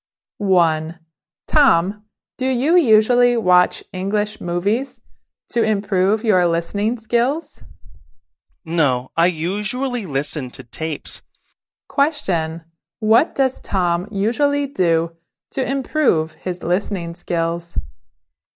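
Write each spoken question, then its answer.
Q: Question, what does Tom usually do to improve his listening skills?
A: He usually listens to tapes.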